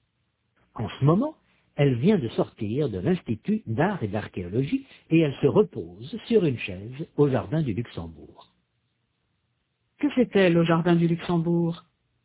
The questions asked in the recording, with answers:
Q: Que fait-elle au jardin du Luxembourg?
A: Elle se repose.